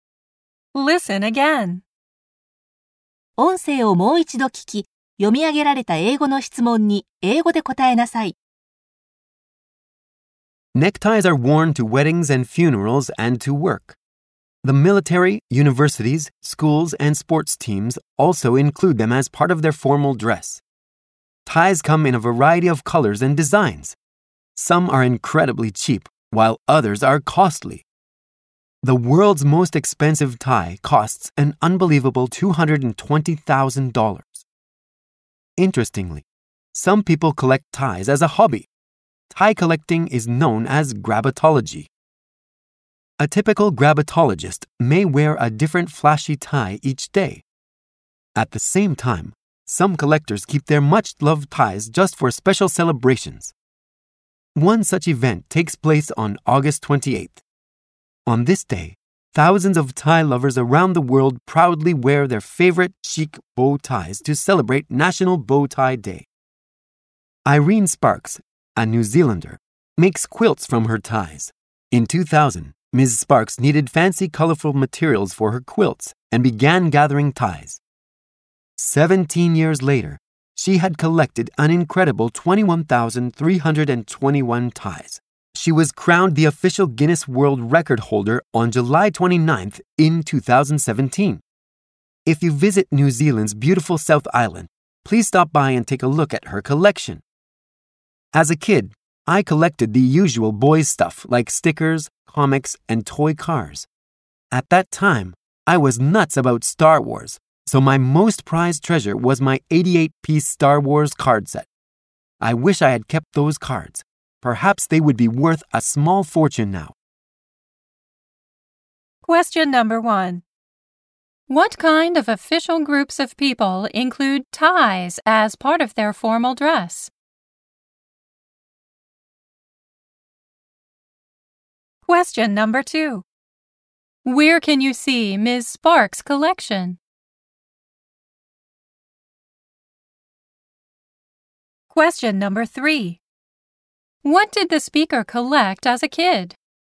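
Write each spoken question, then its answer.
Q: What kind of official groups of people include ties as part of their formal dress?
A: The military, universities, schools, and sports teams

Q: Where can you see Ms. Sparks' collection?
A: On New Zealand's South Island

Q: What did the speaker collect as a kid?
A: Stickers, comics, toy cars, and Star Wars cards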